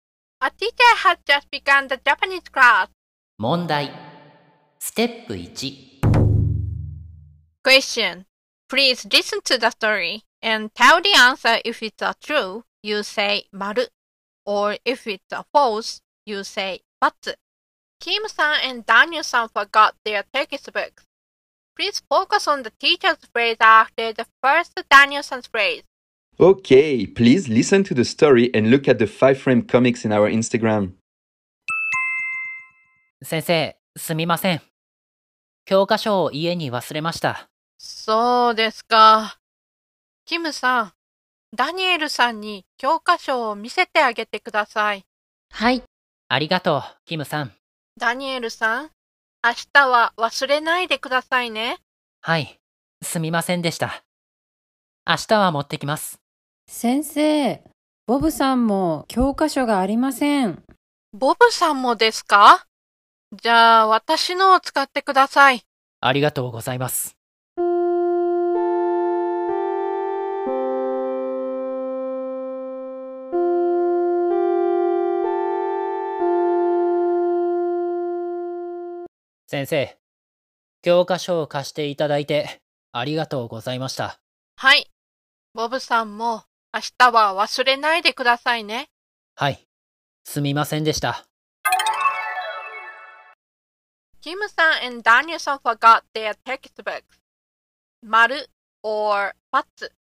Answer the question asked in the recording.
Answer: So maybe the answer is ×.